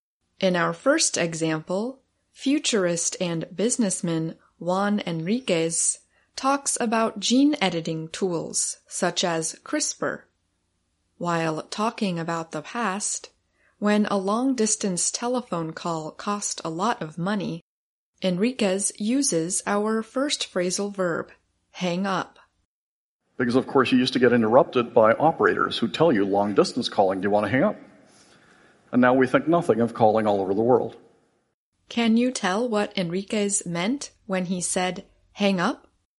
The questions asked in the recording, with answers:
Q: Can you tell what Enriquez meant when he said hang up?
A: to end or finish a phone call

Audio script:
Then you will hear the answer.
#1 Hang up
In our first example, futurist and businessman Juan Enriquez talks about gene editing tools such as CRISPR. While talking about the past, when a long-distance telephone call cost a lot of money, Enriquez uses our first phrasal verb: hang up.
Because, of course, you used to get interrupted by operators who'd tell you, "Long distance calling. Do you want to hang up?" And now we think nothing of calling all over the world.